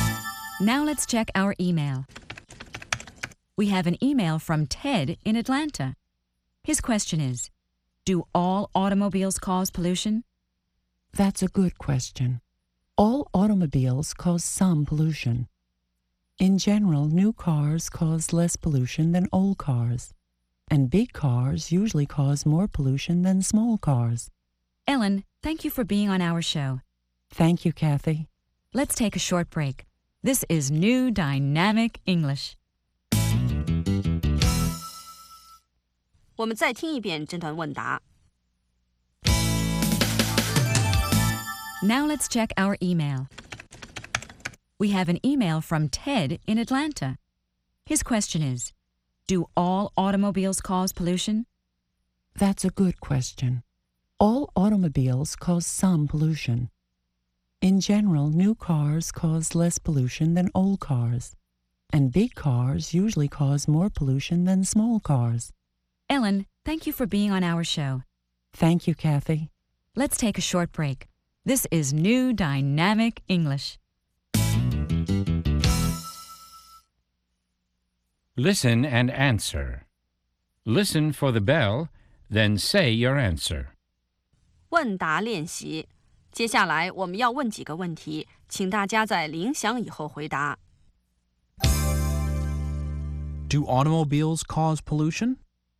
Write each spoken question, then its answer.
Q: Do automobiles cause pollution?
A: Yes, they do.Automobiles cause pollution.